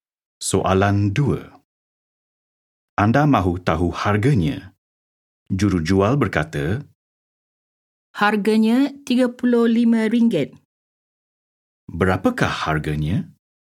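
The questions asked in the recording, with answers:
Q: Berapakah harganya?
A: RM35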